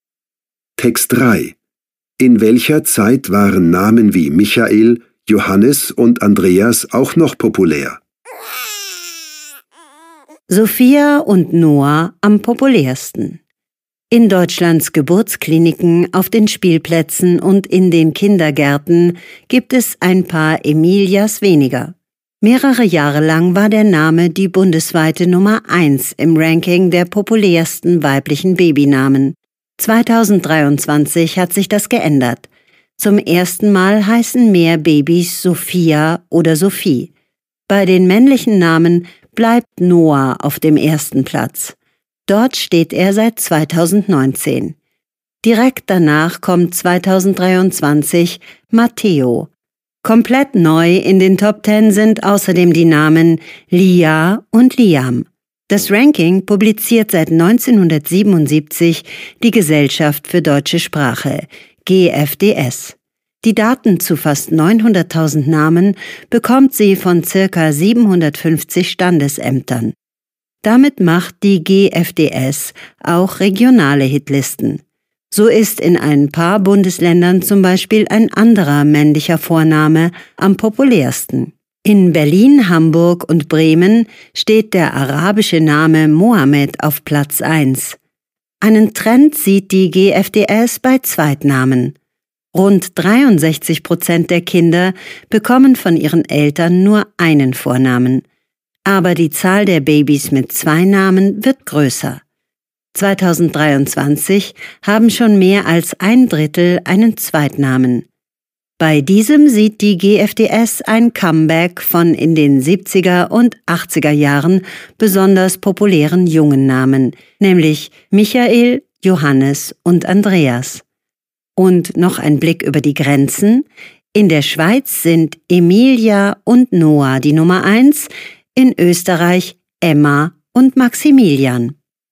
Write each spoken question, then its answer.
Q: In welcher Zeit waren Namen wie Michael, Johannes und Andreas auch noch populär?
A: In den 70er und 80er Jahren waren Michael, Johannes und Andreas besonders populäre Jungennamen.